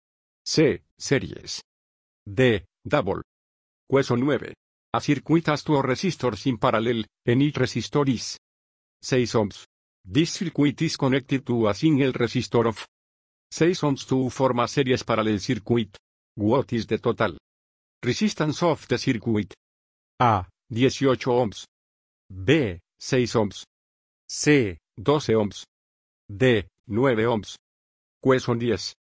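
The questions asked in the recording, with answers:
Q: What is the total resistance of the circuit?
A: D: 9 ohms.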